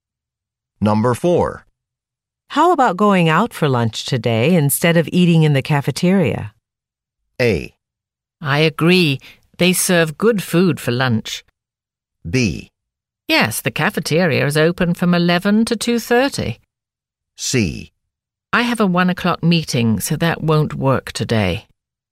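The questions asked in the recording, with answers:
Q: How about going out for lunch today instead of eating in the cafeteria?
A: C: I have a 1 o'clock meeting, so that won't work today.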